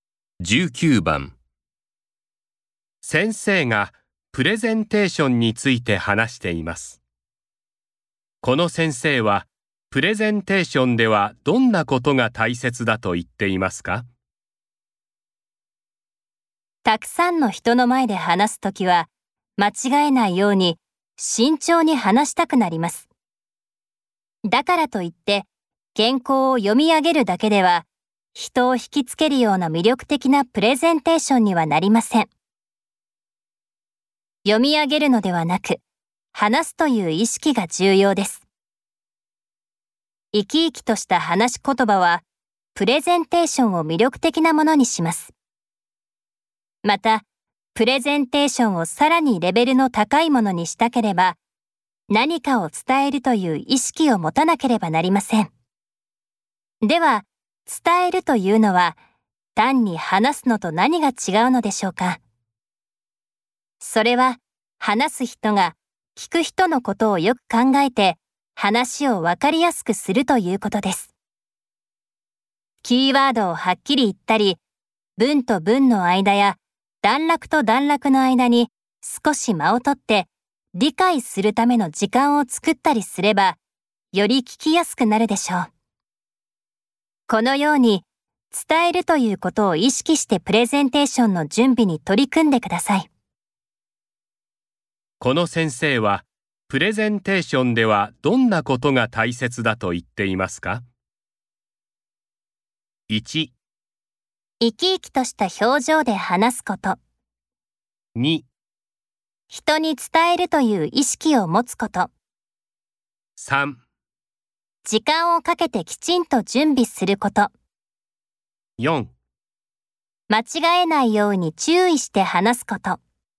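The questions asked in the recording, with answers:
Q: この先生はプレゼンテーションではどんなことが大切だと言っていますか?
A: 2: 人に伝えるという意識を持つこと。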